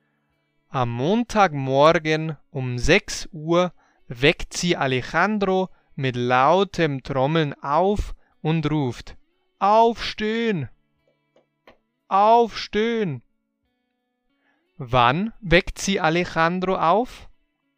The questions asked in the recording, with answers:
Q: Wann weckt sie Alejandro auf?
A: Um 6 Uhr am Montagmorgen.